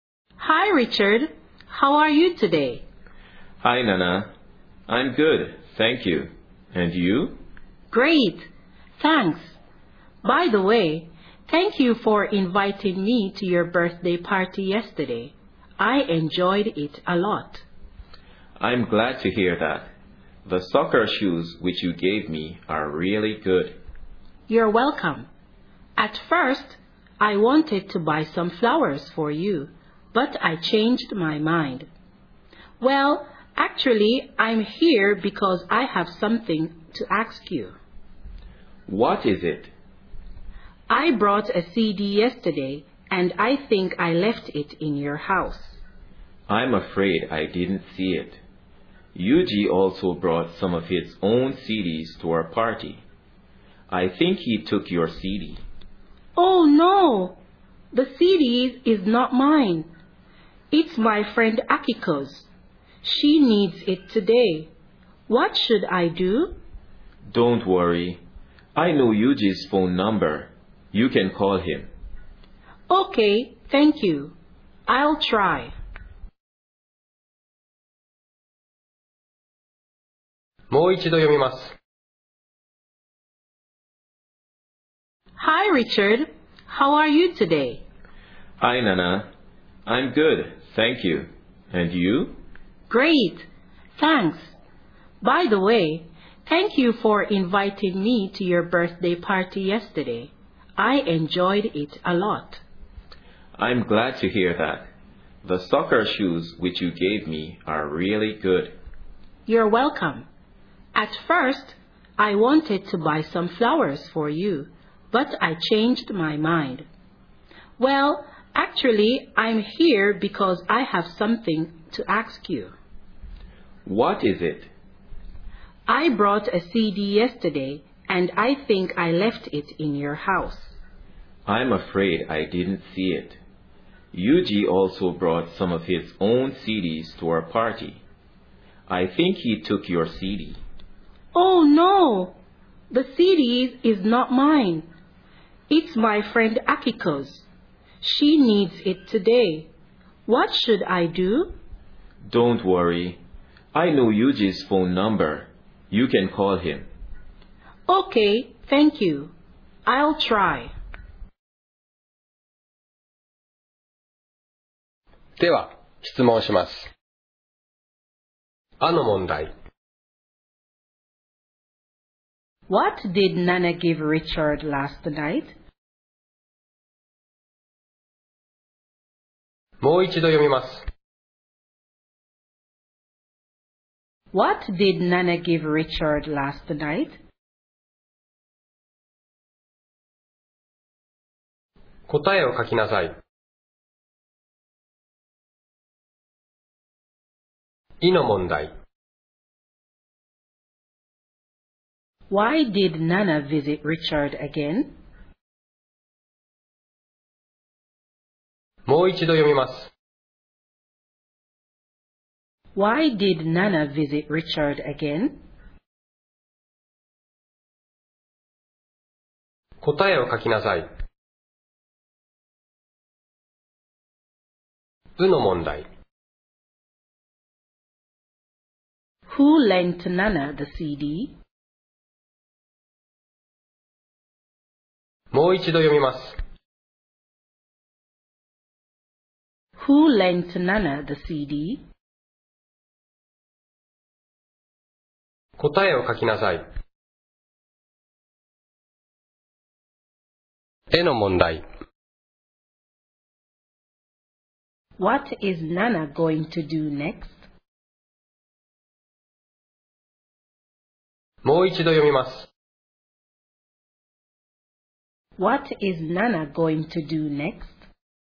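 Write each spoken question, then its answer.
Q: What did Nana give Richard last night?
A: Soccer shoes

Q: Why did Nana visit Richard again?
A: To ask about the CD she left at his house

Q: Who lent Nana the CD?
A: Akiko

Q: What is Nana going to do next?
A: Call Yuji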